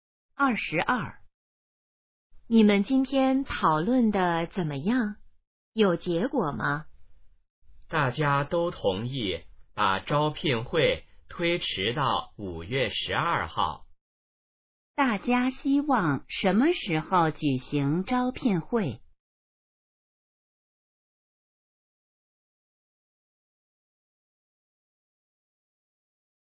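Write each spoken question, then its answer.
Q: 大家希望什么时候举行招聘会?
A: 5月12号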